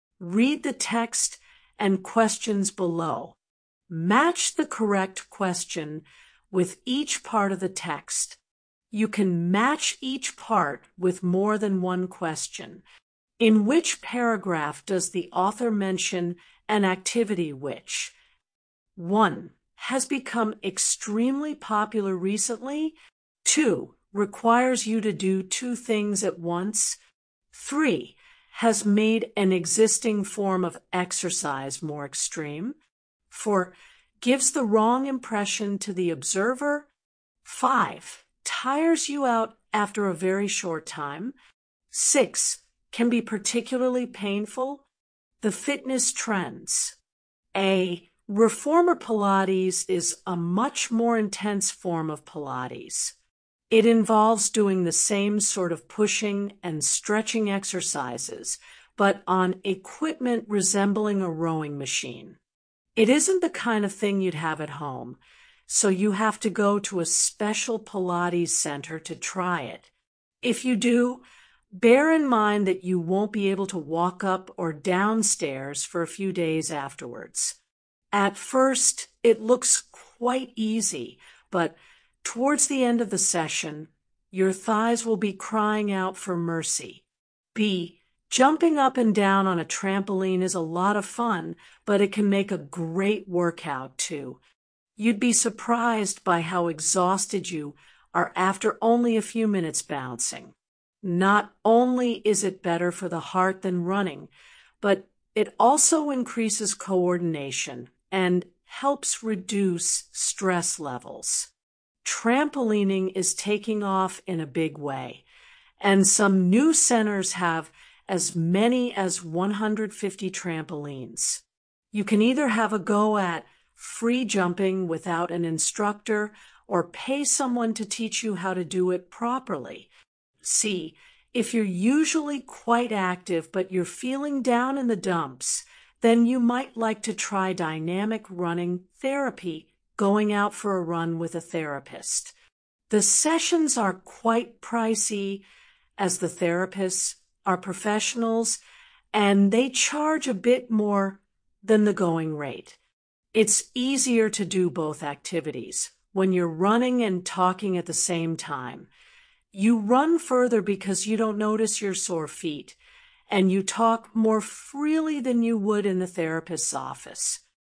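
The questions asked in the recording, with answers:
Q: Has become extremely popular recently.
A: B: trampolining

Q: Requires you to do two things at once.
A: C: dynamic running therapy

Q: Has made an existing form of exercise more extreme.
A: A: Reformer Pilates

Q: Gives the wrong impression to the observer.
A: A: Reformer Pilates

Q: Tires you out after a very short time.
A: B: trampolining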